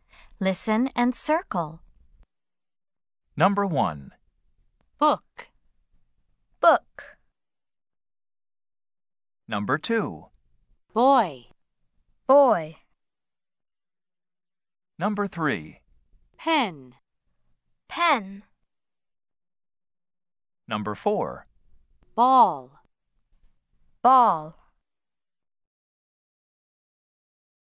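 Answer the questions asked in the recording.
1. Yes (book)
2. Yes (boy)
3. No (pen)
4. Yes (ball)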